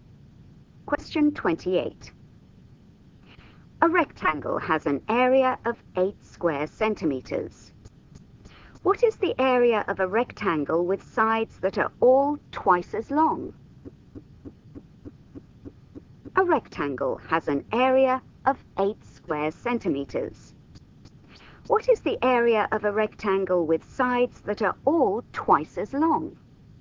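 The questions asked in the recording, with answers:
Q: What is the area of a rectangle with sides that are all twice as long?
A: 32 square centimeters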